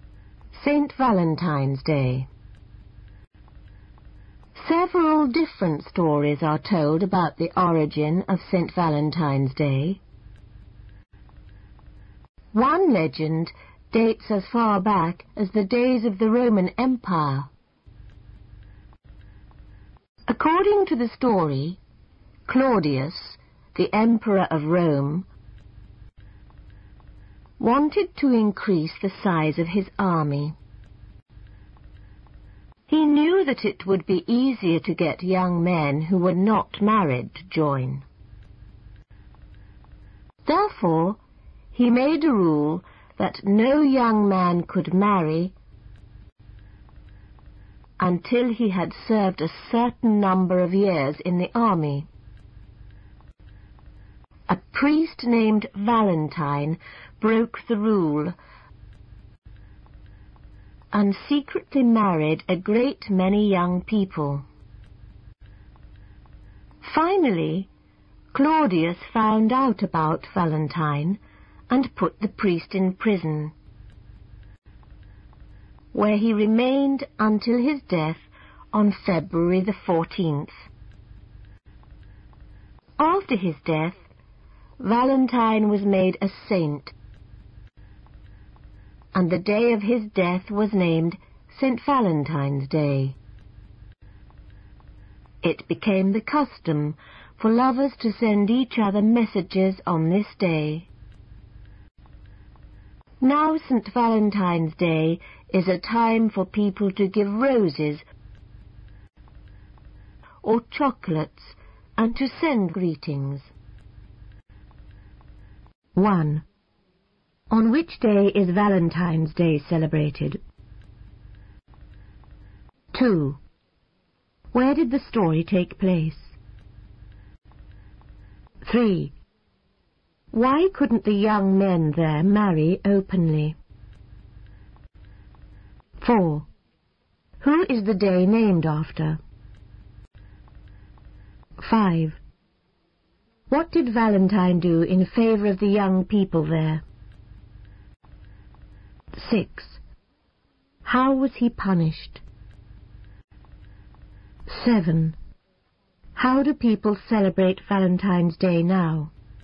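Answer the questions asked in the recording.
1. February 14th
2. In Rome (the Roman Empire)
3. The Emperor forbade marriage before army service
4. A priest named Valentine
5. He secretly married them
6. He was put in prison until his death
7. By giving roses or chocolates and sending greetings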